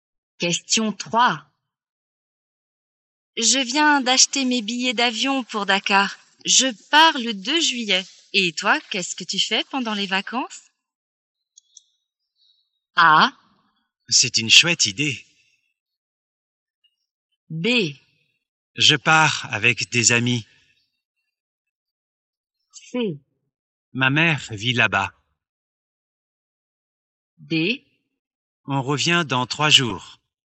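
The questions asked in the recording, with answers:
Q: Et toi, qu'est-ce que tu fais pendant les vacances?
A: B: Je pars avec des amis.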